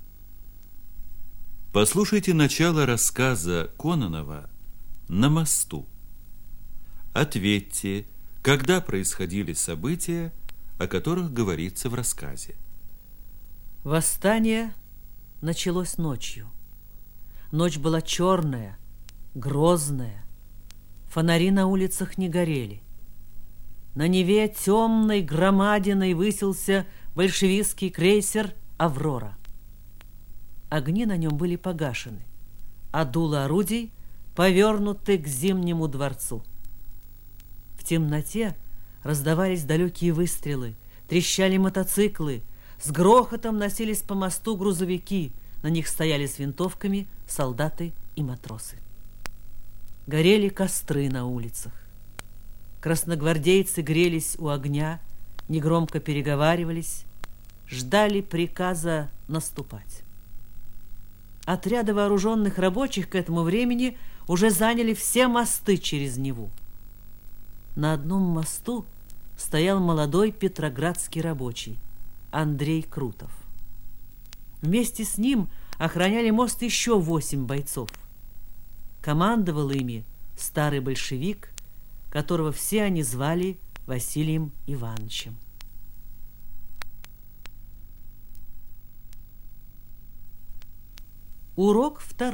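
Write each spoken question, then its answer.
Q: Ответьте, когда происходили события, о которых говорится в рассказе.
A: Ночью во время Октябрьского восстания 1917 года в Петрограде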